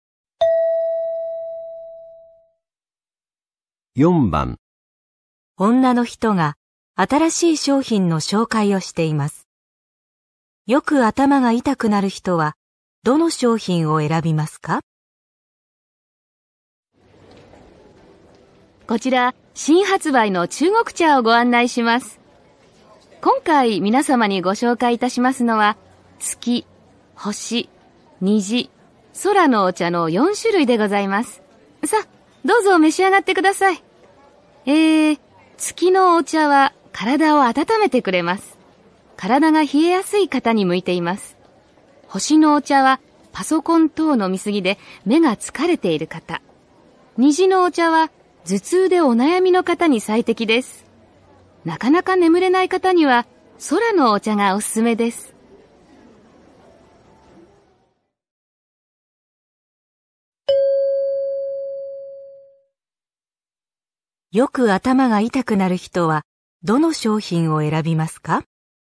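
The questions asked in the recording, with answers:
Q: よく頭が痛くなる人はどの商品を選びますか?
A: 虹のお茶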